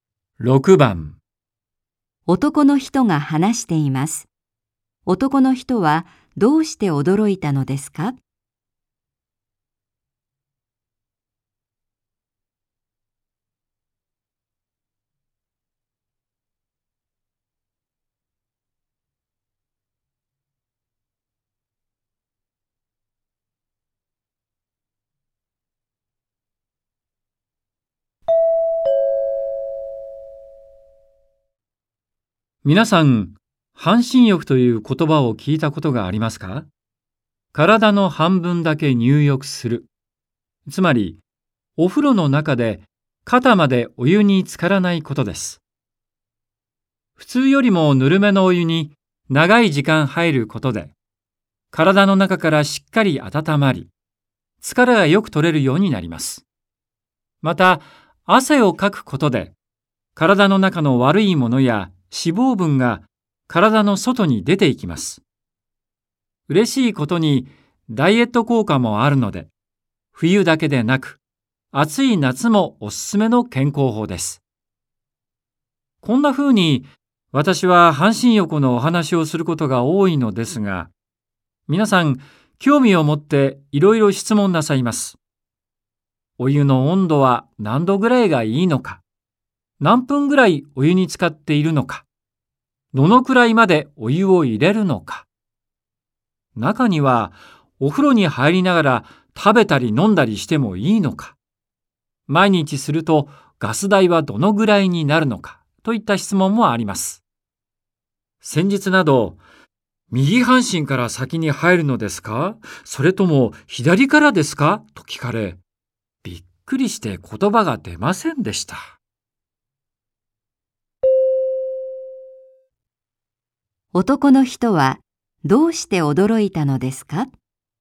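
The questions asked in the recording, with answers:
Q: 男の人はどうして驚いたのですか?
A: 半身浴は右半身と左半身のどちらから先に入るのかと聞かれたから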